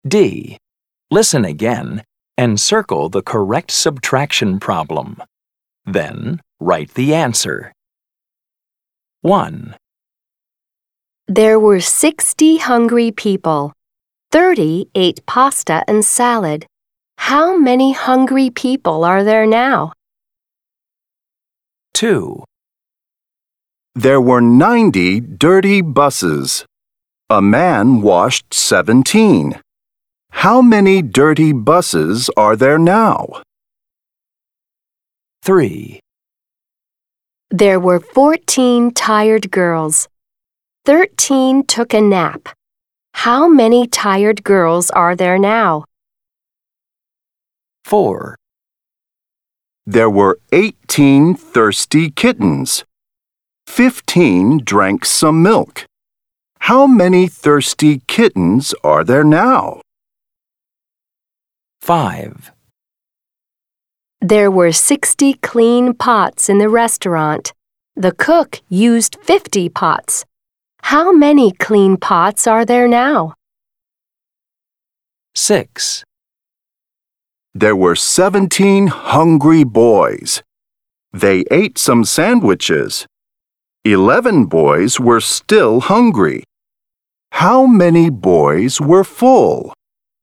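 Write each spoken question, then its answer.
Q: How many hungry people are there now?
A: 30

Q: How many dirty buses are there now?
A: 73

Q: How many clean pots are there now?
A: 10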